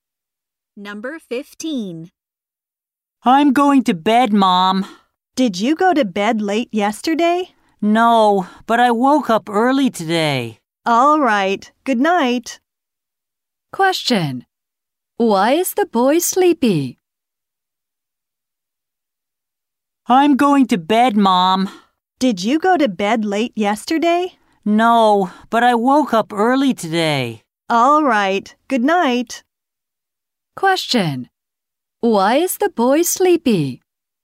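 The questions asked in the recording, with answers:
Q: Why is the boy sleepy?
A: He woke up early today.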